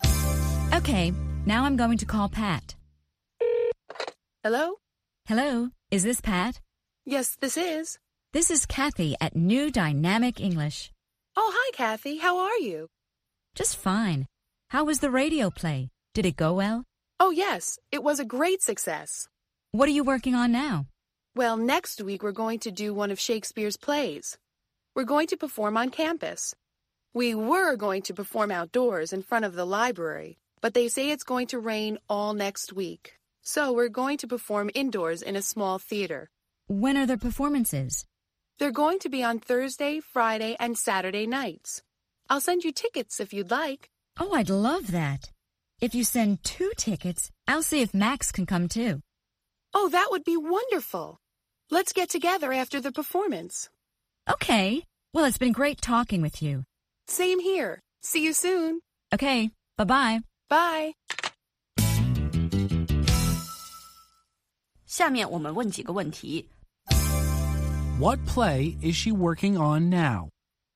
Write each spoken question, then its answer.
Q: What play is she working on now?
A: She's working on a play by Shakespeare.